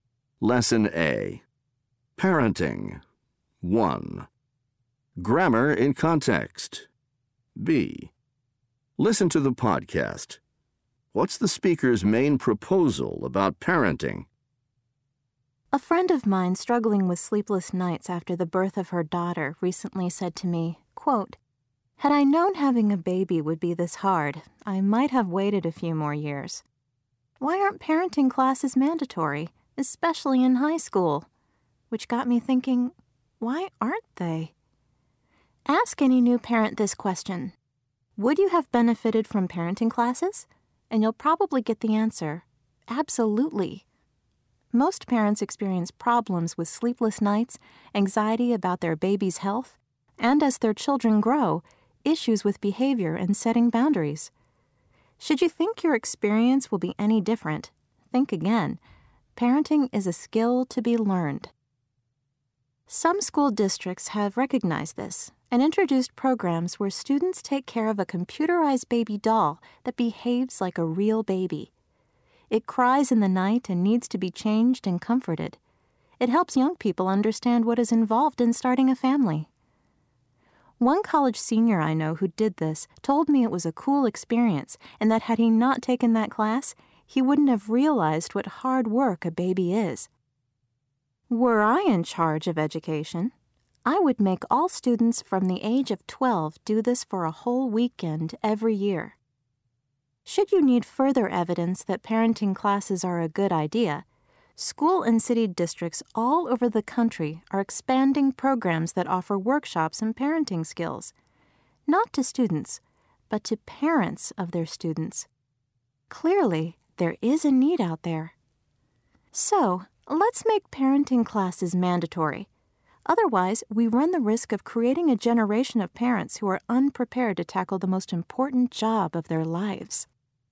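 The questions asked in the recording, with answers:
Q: What's the speaker's main proposal about parenting?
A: Parenting classes should be mandatory, especially in high school.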